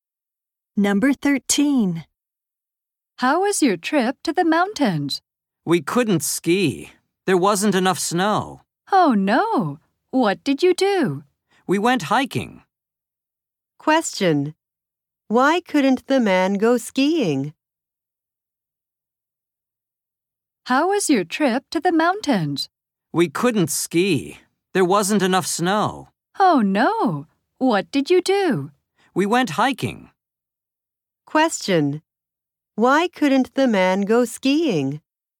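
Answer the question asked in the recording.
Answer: There wasn't enough snow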